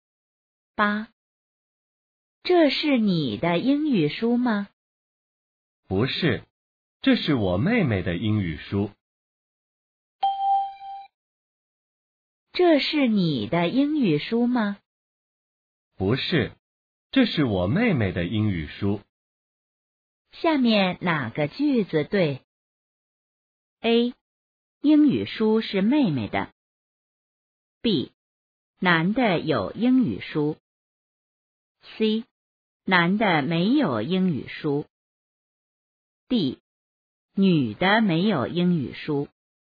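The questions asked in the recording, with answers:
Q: 下面哪个句子对?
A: A: 英语书是妹妹的。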